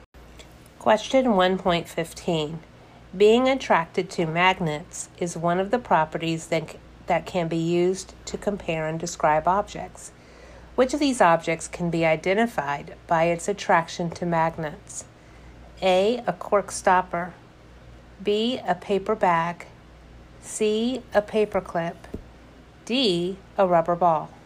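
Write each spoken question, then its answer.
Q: Which of these objects can be identified by its attraction to magnets?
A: C: A paper clip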